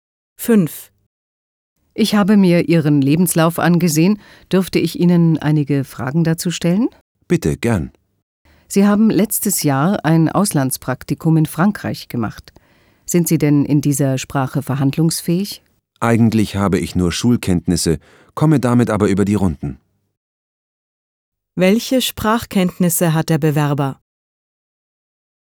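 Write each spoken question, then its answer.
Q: Welche Sprachkenntnisse hat der Bewerber?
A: Nur Schulkenntnisse in Französisch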